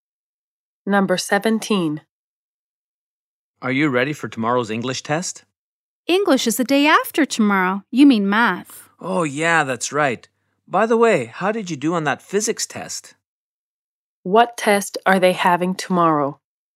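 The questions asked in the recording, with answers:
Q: What test are they having tomorrow?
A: Math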